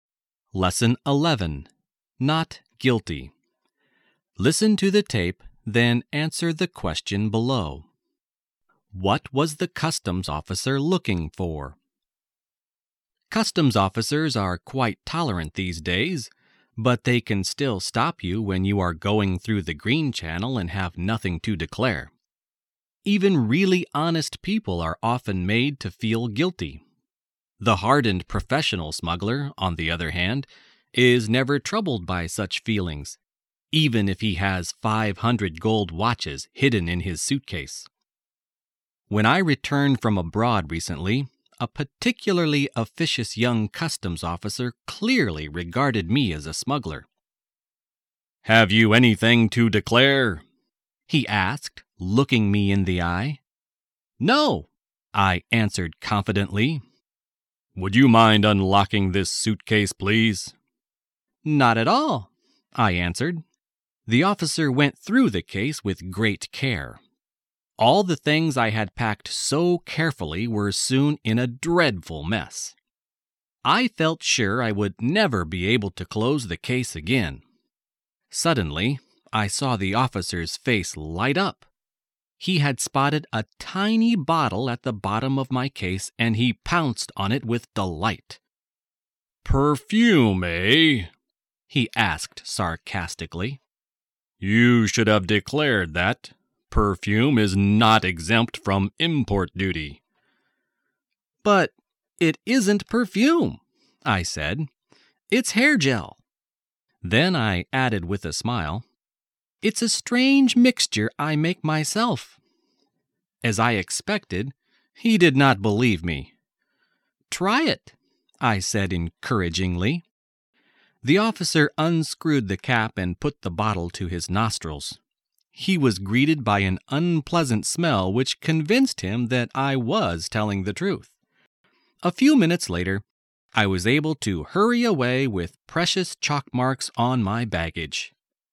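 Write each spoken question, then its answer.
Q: What was the customs officer looking for?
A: Smuggled goods (he suspected the bottle was perfume that should have been declared)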